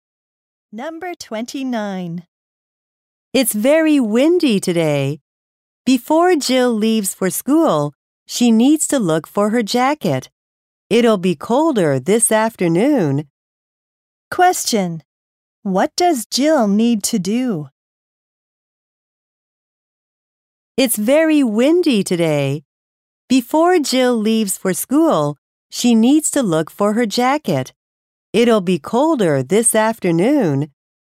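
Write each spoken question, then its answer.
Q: What does Jill need to do?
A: Look for her jacket.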